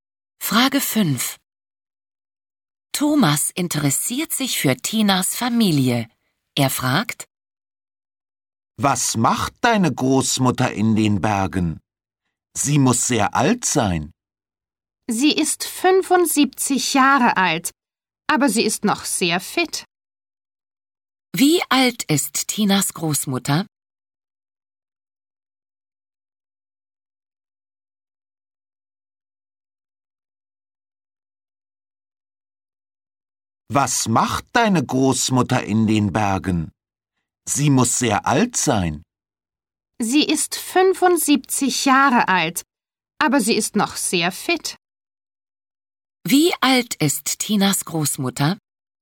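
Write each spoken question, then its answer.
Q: Wie alt ist Tinas Großmutter?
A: 75 Jahre alt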